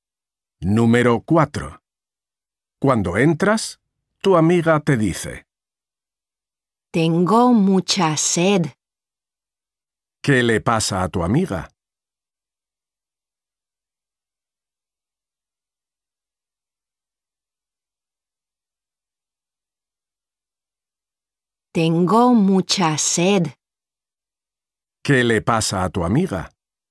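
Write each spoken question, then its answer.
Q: ¿Qué le pasa a tu amiga?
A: tiene mucha sed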